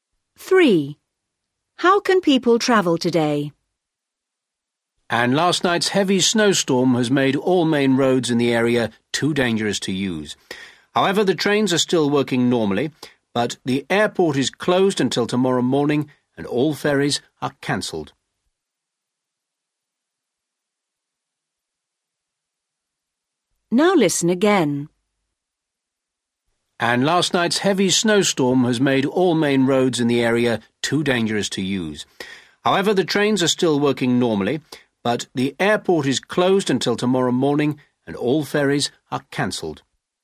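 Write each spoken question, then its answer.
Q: How can people travel today?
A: by train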